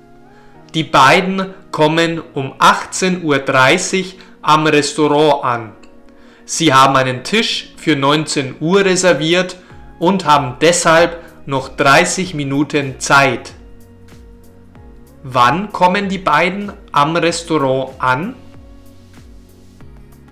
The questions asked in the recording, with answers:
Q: Wann kommen die beiden am Restaurant an?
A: Um 18.30 Uhr. Sie kommen um 18.30 Uhr am Restaurant an.